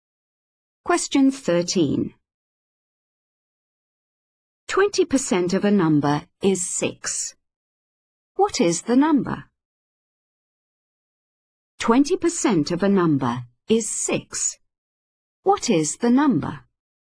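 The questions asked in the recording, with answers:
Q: 20% of a number is 6. What is the number?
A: 30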